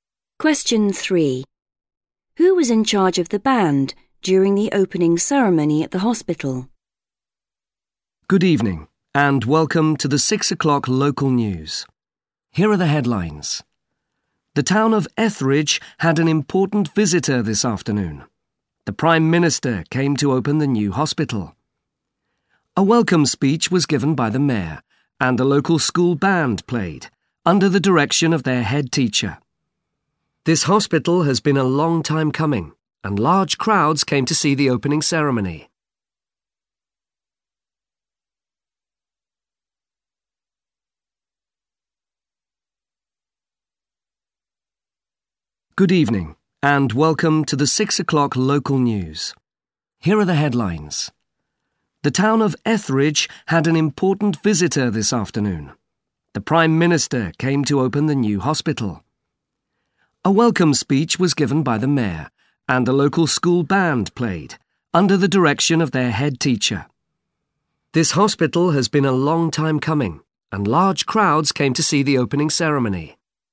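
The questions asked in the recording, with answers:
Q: Who was in charge of the band during the opening ceremony at the hospital?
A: The head teacher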